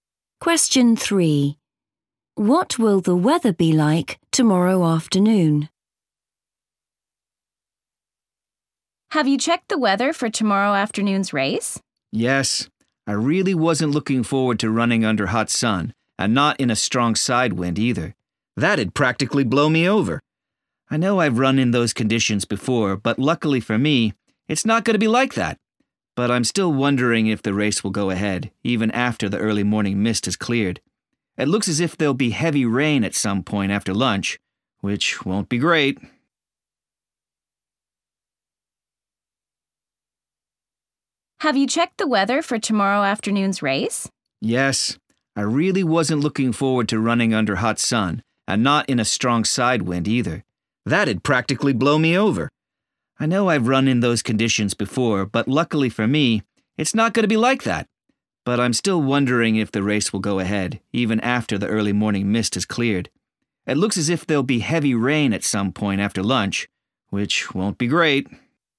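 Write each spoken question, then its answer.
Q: What will the weather be like tomorrow afternoon?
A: heavy rain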